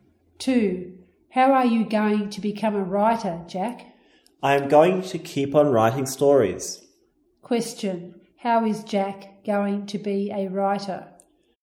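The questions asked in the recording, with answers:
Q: Question, how is Jack going to be a writer?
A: By keeping on writing stories.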